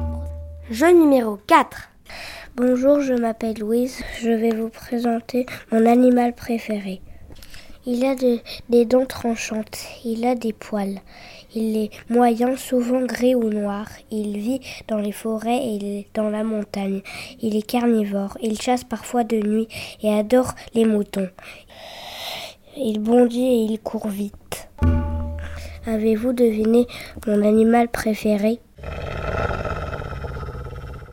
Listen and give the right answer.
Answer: Mon animal préféré était le loup.